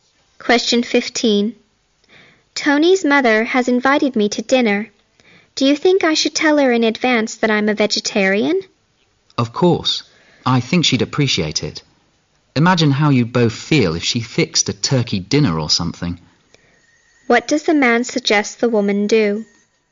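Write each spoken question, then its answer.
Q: What does the man suggest the woman do?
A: Tell Tony's mother in advance that she is a vegetarian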